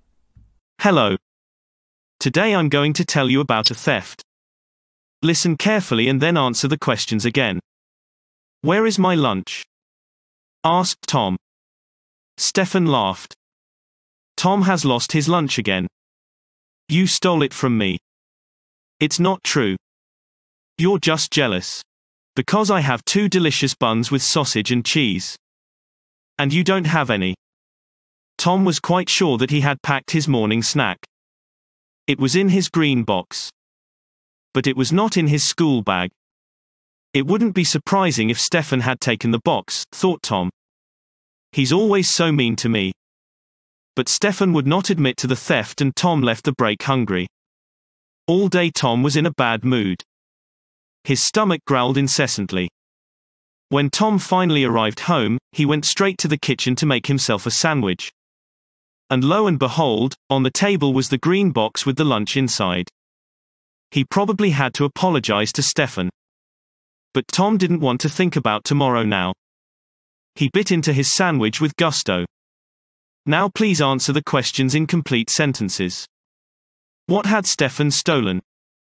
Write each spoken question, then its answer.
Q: What had Stefan stolen?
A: Stefan did not steal anything at all, but was falsely accused of stealing.